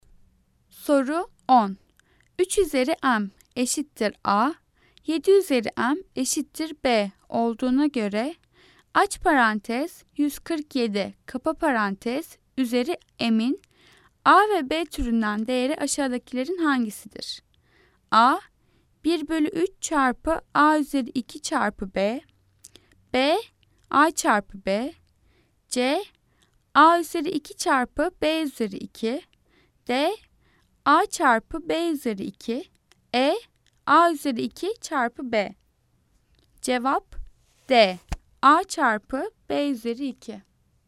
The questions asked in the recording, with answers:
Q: 3 üzeri m eşittir a, 7 üzeri m eşittir b olduğuna göre aç parantez 147 kapa parantez üzeri m'in a ve b türünden değeri aşağıdakilerin hangisidir?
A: Cevap d. A çarpı b üzeri 2.